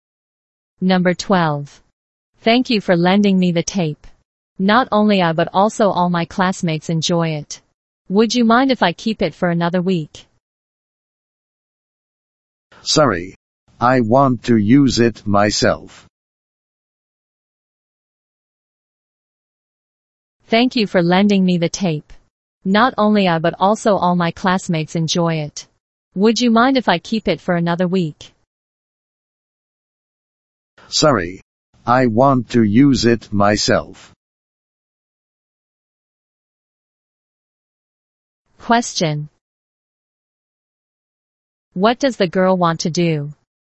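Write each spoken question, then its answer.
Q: What does the girl want to do?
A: Keep the tape for another week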